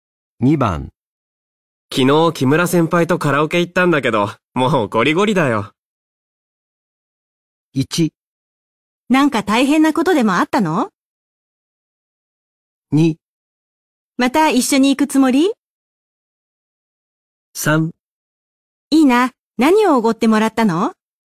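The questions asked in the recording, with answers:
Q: 昨日木村先輩とカラオケ行ったんだけど、もうゴリゴリだよ。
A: 1: なんか大変なことでもあったの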